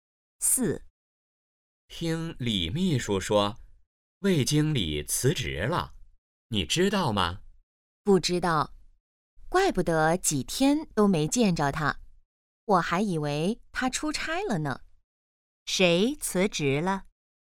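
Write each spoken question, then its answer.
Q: 谁辞职了?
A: 魏经理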